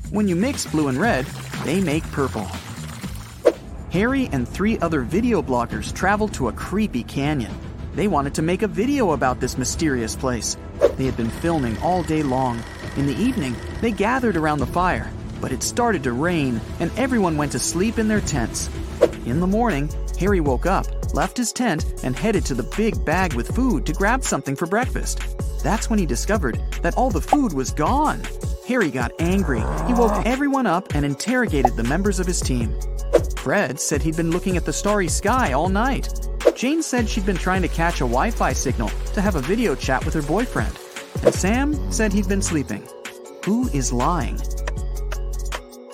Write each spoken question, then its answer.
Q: Who is lying?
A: It's Fred.